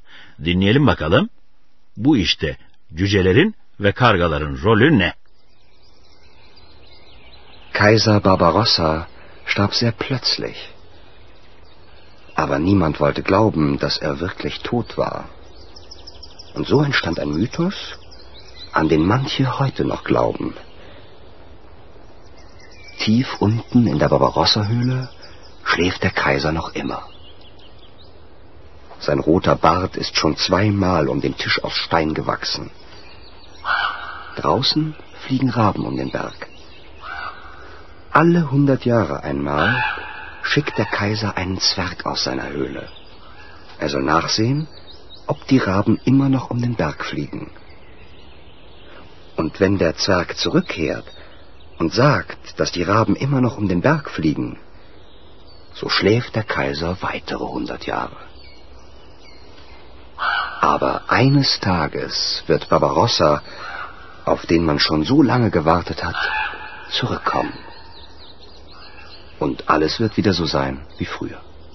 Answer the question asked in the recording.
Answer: Cüce dışarıya çıkıp kargaların hala dağın çevresinde uçup uçmadığına bakıyormuş.